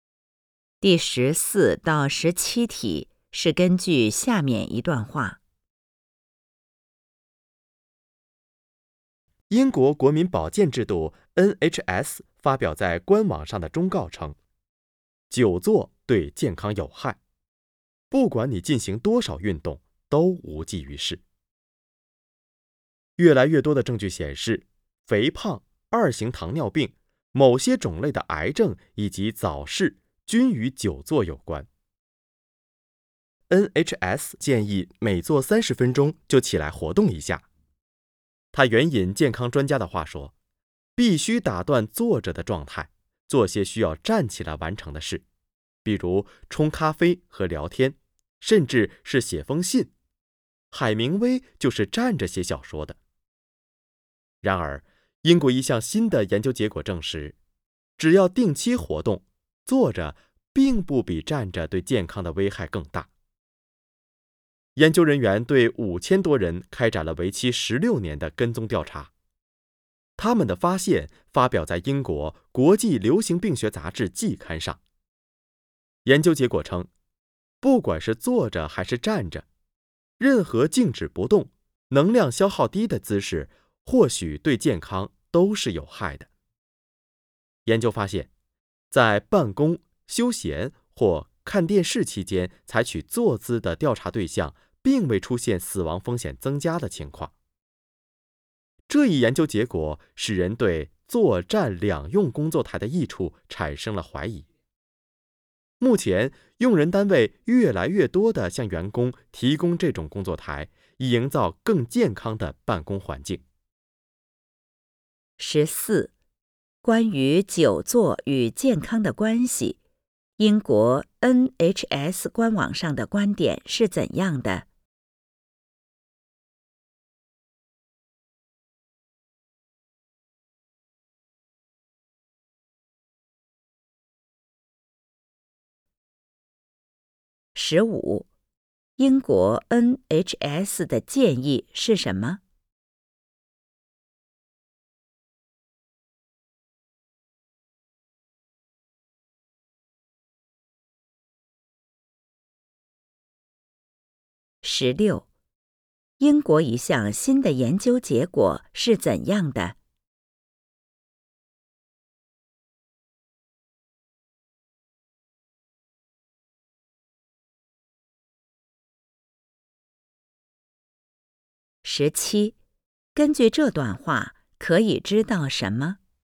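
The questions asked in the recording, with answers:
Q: 关于久坐与健康的关系,英国 NHS 官网上的观点是怎样的?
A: 久坐对健康有害,运动多少也无济于事

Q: 英国 NHS 的建议是什么?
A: 每坐30分钟就起来活动一下

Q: 英国一项新的研究结果是怎样的?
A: 只要定期活动,坐着并不比站着对健康危害更大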